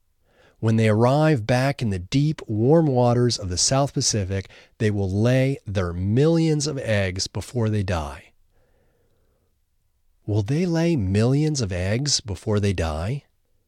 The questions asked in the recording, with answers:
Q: Will they lay millions of eggs before they die?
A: Yes, they will lay millions of eggs before they die.